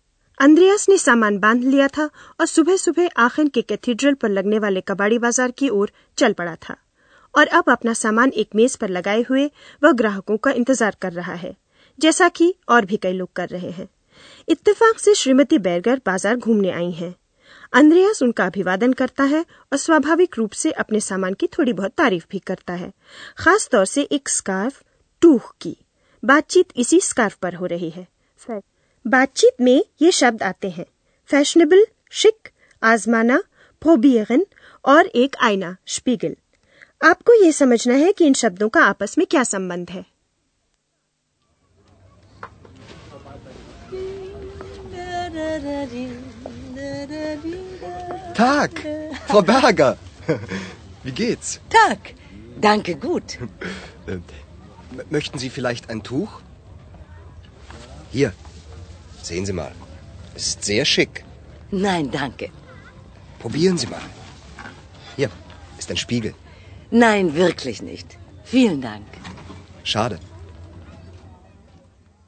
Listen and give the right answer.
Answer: अंद्रिया scarf की fashionable कहकर तारीफ कर रहा है वह चाहता है कि श्रीमती बैरगर एक बार उसे पहनकर आईने में खुद को देखने के लिए तैयार हो जाएं।